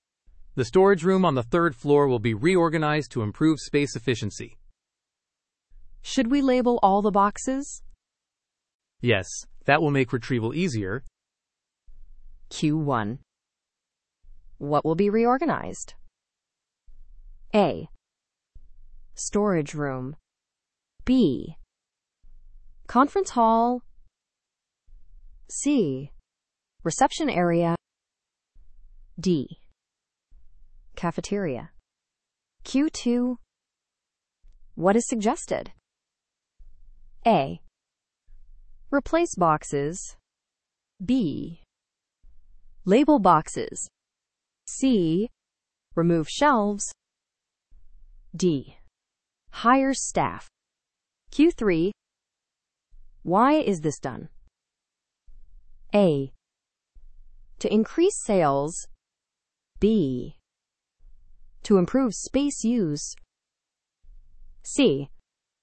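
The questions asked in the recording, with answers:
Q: What will be reorganized?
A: A: Storage room.

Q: What is suggested?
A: B: Label boxes.

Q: Why is this done?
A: B: To improve space use.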